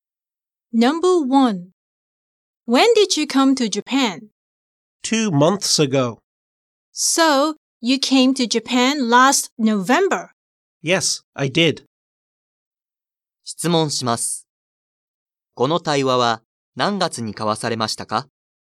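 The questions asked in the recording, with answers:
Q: この対話は何月に交わされましたか?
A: 1月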